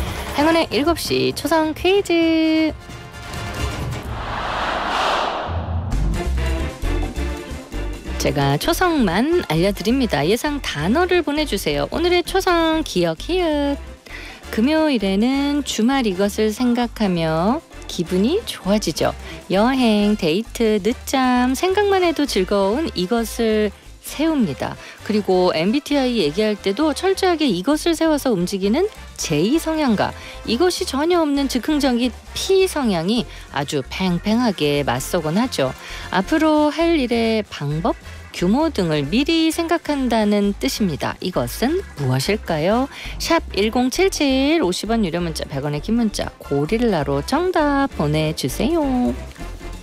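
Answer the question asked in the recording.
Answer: 계획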